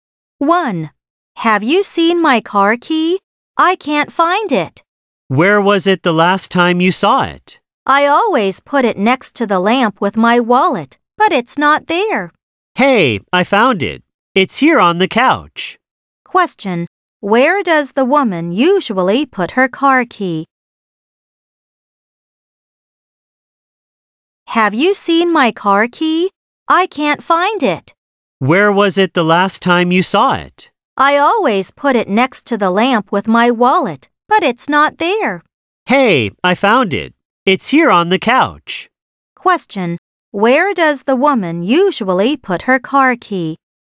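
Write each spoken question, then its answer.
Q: Where does the woman usually put her car key?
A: Next to the lamp, with her wallet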